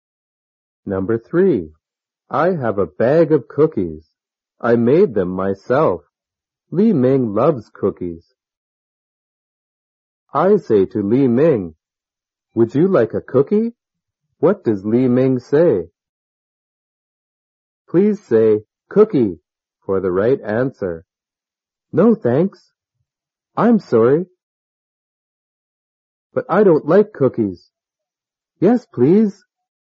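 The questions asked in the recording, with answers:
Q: What does Li Ming say?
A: Yes, please.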